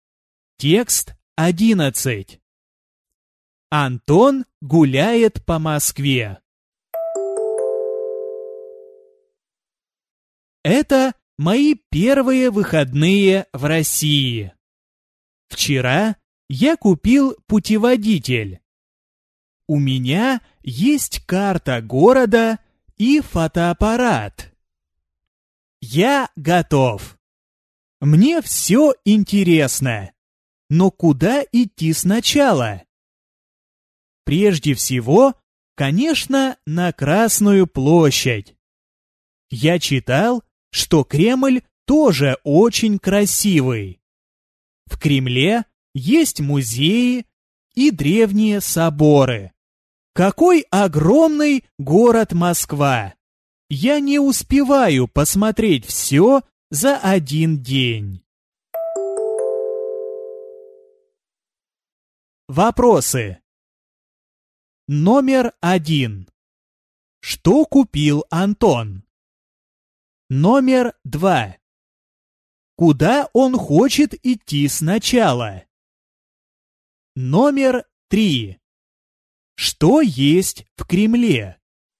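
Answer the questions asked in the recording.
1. Путеводитель
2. На Красную площадь
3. Музеи и древние соборы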